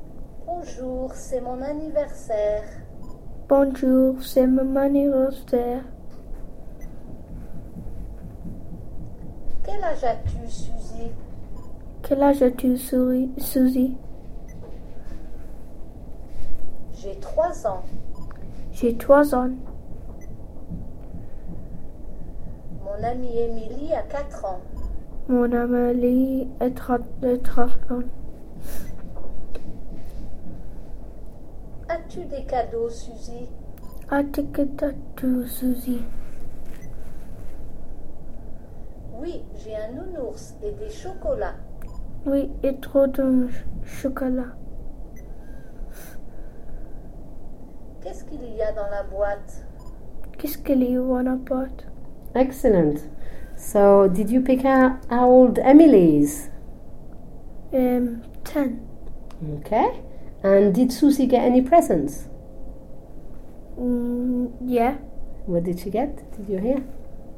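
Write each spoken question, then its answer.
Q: And did Susie get any presents?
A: Yes

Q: What did she get? Did you hear?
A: A teddy bear and chocolates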